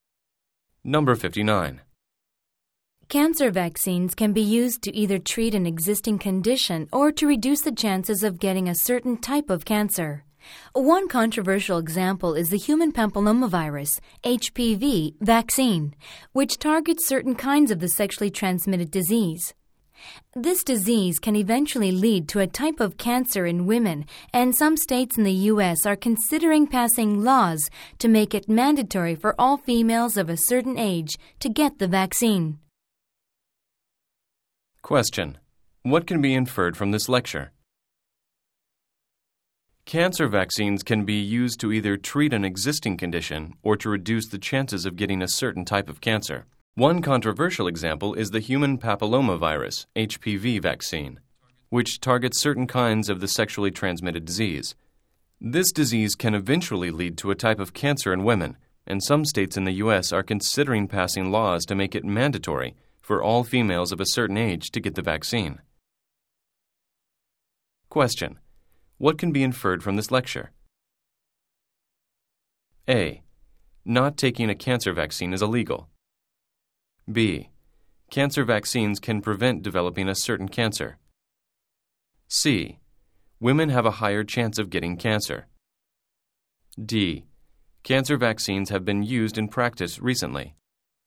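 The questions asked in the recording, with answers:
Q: what can be inferred from this lecture?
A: B: Cancer vaccines can prevent developing a certain cancer.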